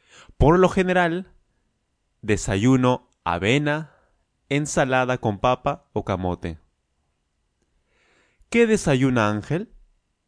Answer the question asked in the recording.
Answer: Avena. Avena, ensalada con papa o camote.